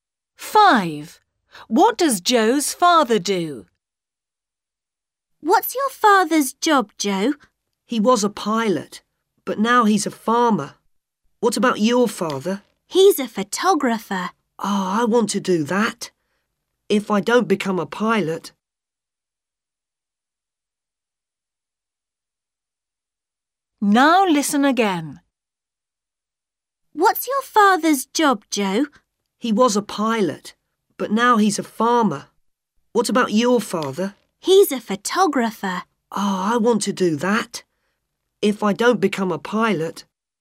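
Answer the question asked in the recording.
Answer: He's a farmer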